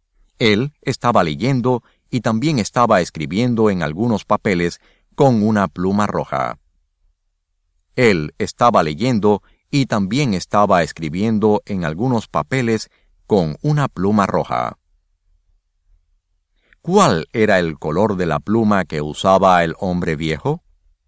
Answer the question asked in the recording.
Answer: El color de la pluma que usaba el hombre viejo era del color rojo.